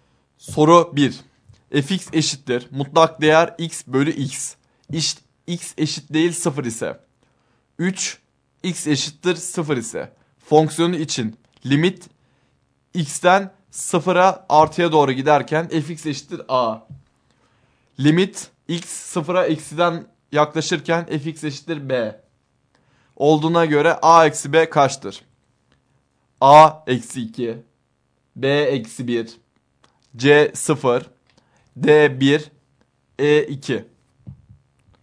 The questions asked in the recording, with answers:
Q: Olduğuna göre a eksi b kaçtır?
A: Doğru yanıt e şıkkı.